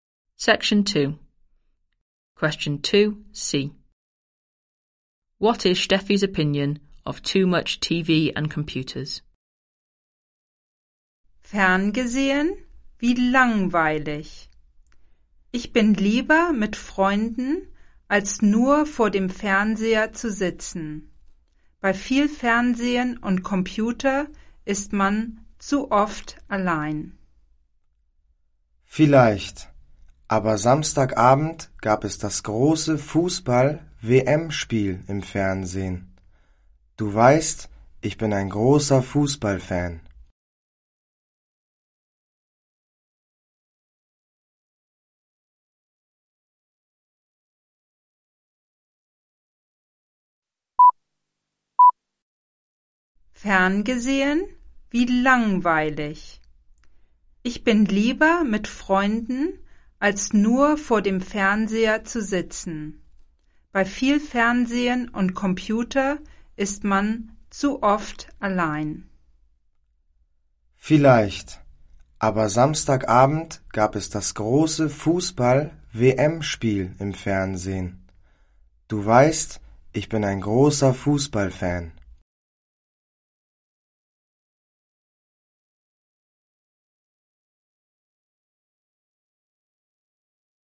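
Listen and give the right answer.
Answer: You are alone too often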